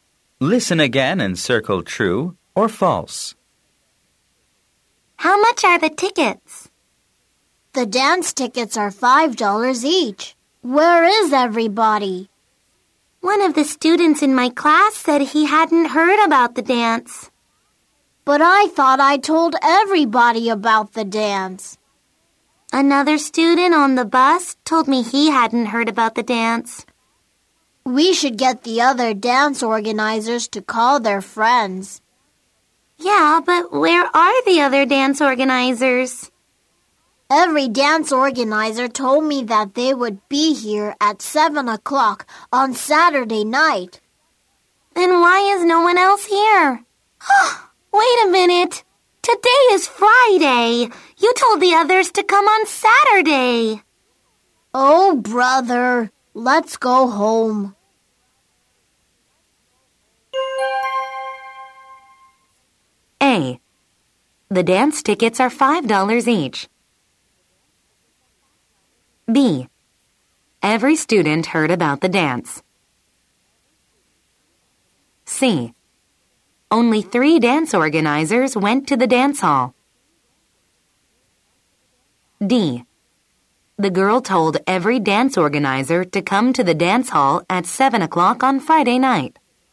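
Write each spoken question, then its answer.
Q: The dance tickets are $5 each.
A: True

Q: Every student heard about the dance.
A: False

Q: The girl told every dance organizer to come to the dance hall at 7 o'clock on Friday night.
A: False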